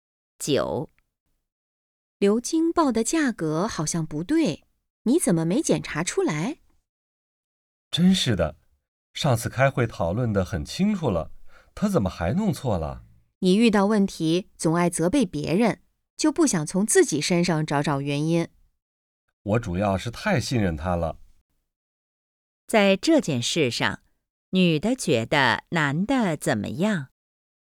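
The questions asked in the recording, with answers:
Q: 在这件事上,女的觉得男的怎么样?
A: 遇到问题总爱责备别人,不从自己身上找原因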